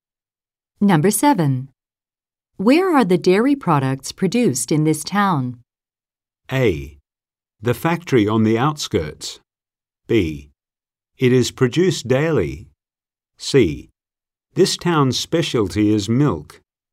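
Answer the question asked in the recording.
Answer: A: The factory on the outskirts.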